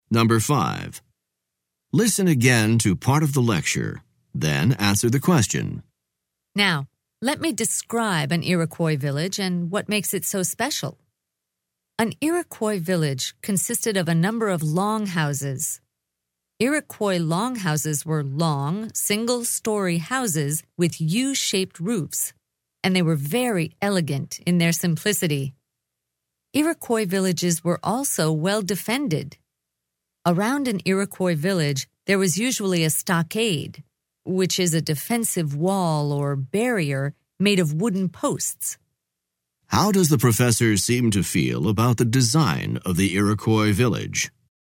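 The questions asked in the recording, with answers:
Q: How does the professor seem to feel about the design of the Iroquois village?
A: He admires it; he thinks it is elegant in its simplicity and well-defended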